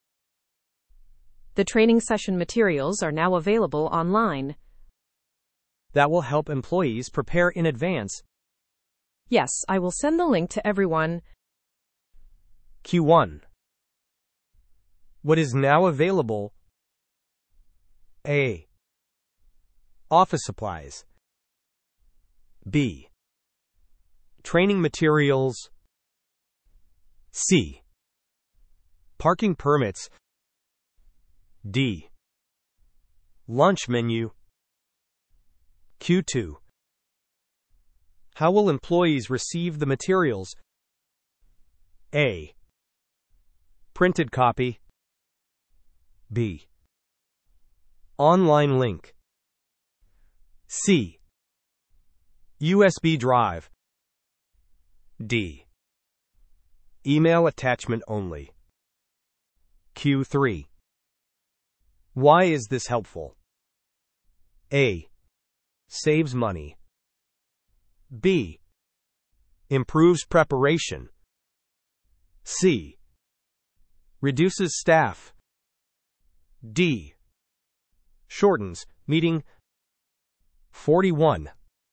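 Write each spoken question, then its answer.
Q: What is now available?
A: B: Training materials.

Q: How will employees receive the materials?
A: B: Online link.

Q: Why is this helpful?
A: B: Improves preparation.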